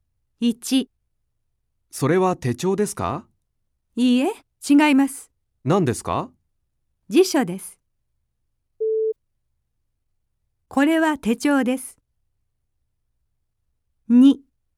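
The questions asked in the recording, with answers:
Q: これは手帳です。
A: いいえ(×):辞書です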